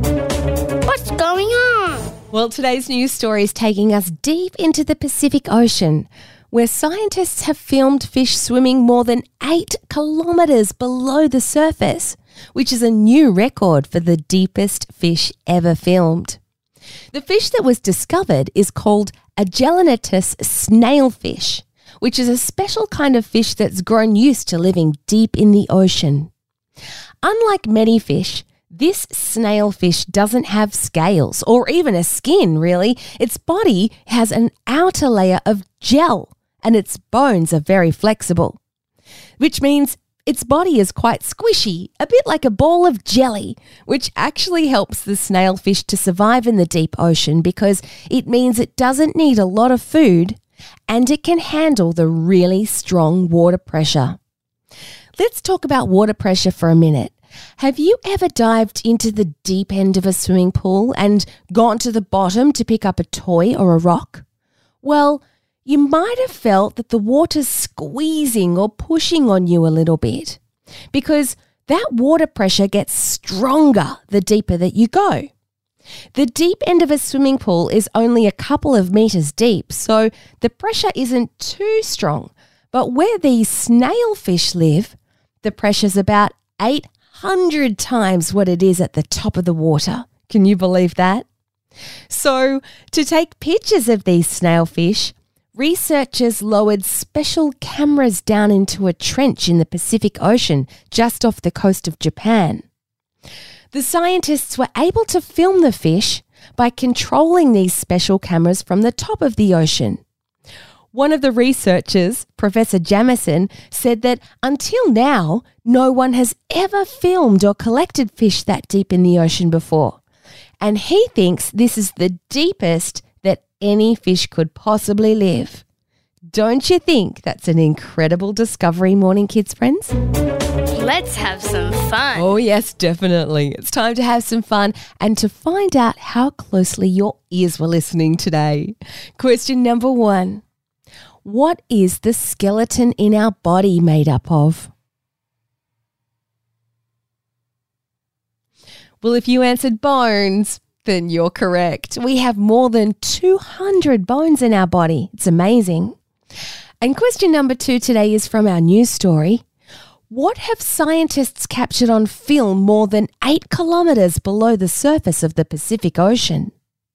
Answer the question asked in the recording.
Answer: If you answered fish, well done, you got it right.